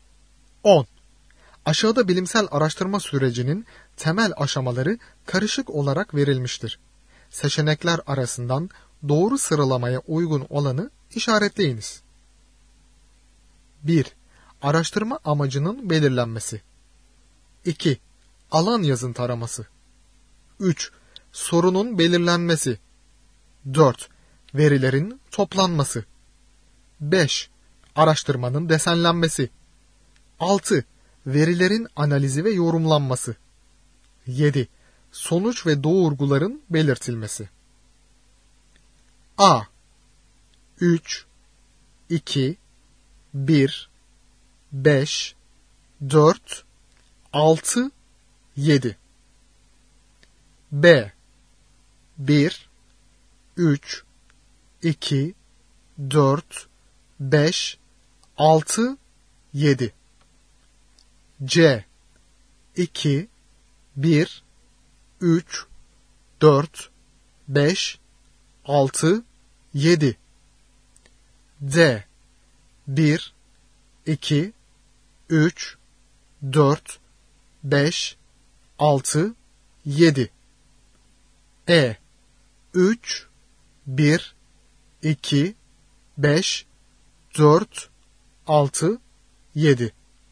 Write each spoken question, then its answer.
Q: Seçenekler arasından doğru sıralamaya uygun olanı işaretleyiniz.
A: Doğru yanıt A şıkkı. 3 2 1 5 4 6 7